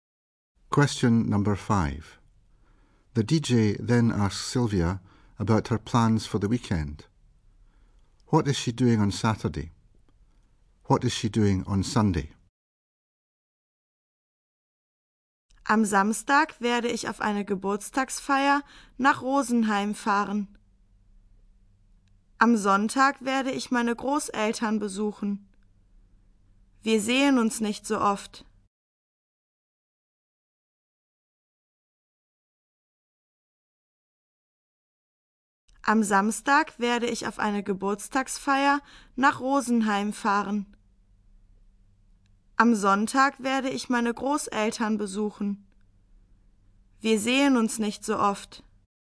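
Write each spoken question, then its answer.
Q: What is she doing on Saturday?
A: Going to a birthday party in Rosenheim

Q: What is she doing on Sunday?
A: Visiting her grandparents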